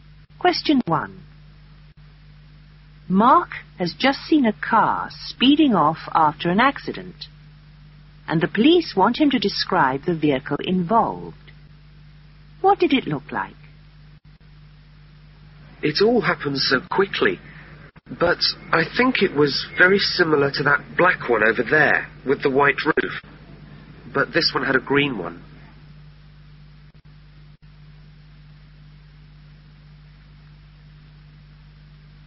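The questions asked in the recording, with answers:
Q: What did it look like?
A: Black with a green roof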